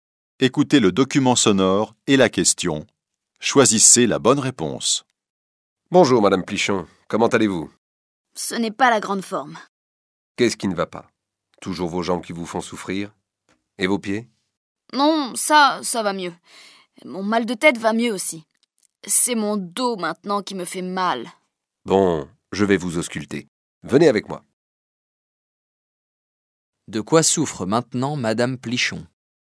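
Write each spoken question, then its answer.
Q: De quoi souffre maintenant Madame Plichon ?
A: Du dos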